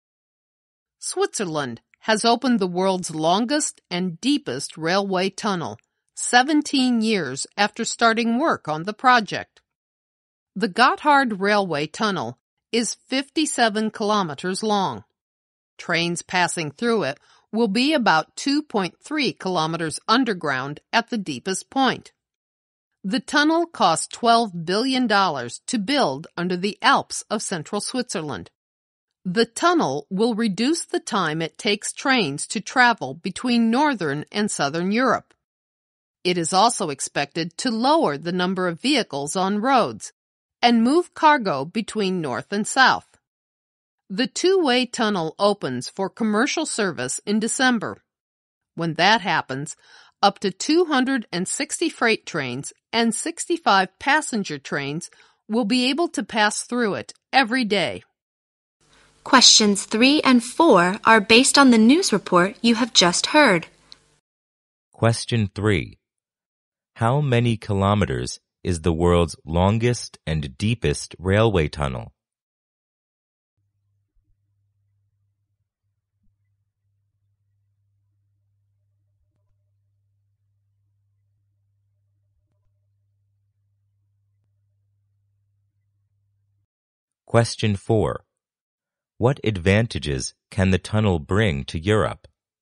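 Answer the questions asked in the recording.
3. 57 kilometers
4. It will cut train travel time between northern and southern Europe, reduce road traffic and move cargo between north and south.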